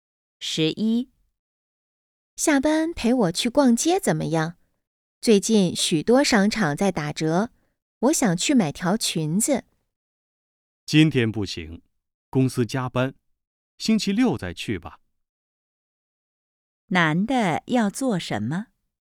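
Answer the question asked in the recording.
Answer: 加班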